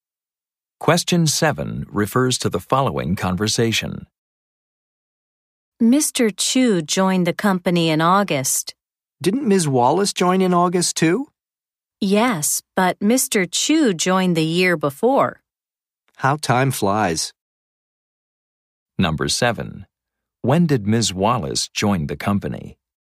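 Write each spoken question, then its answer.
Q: When did Ms. Wallace join the company?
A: In August, a year after Mr. Chu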